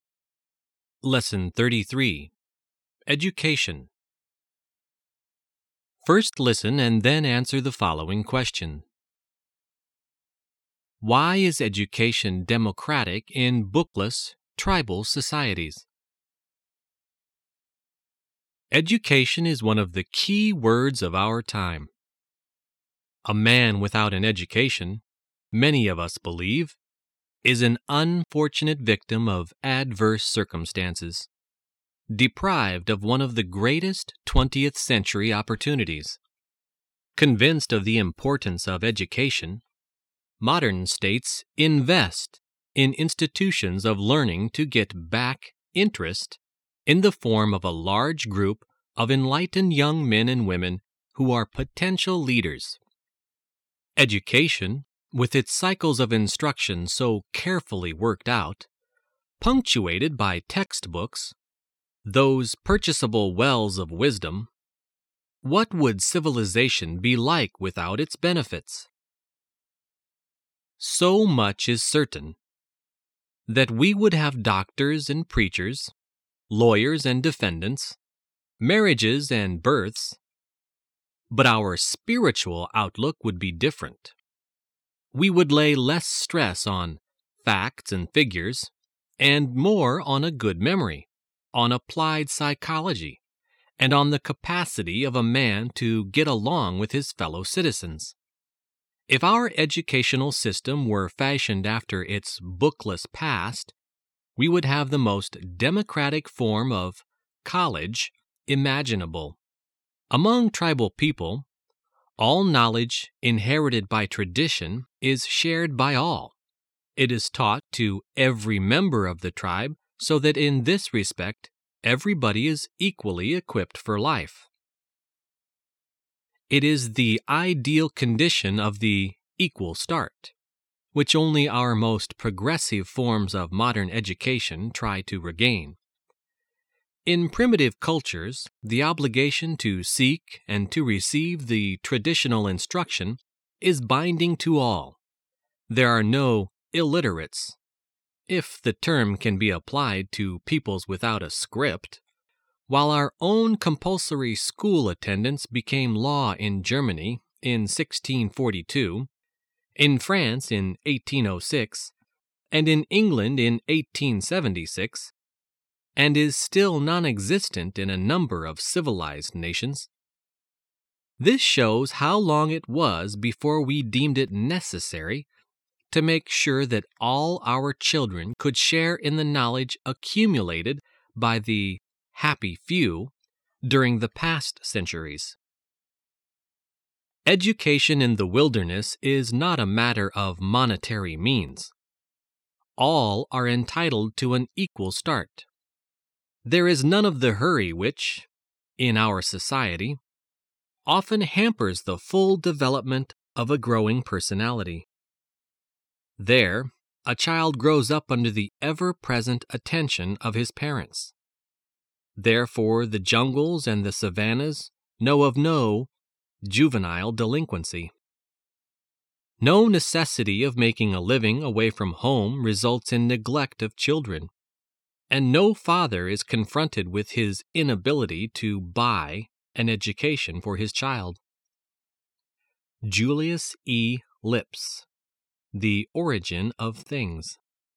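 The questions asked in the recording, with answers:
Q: Why is education democratic in bookless, tribal societies?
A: Because all traditional knowledge is shared by all and taught to every member of the tribe, so everyone has an equal start regardless of money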